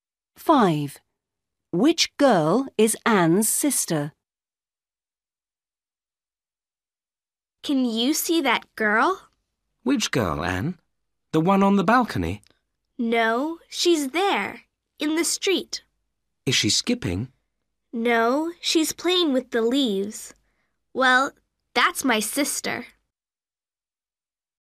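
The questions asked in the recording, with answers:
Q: Which girl is Anne's sister?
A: The girl in the street playing with the leaves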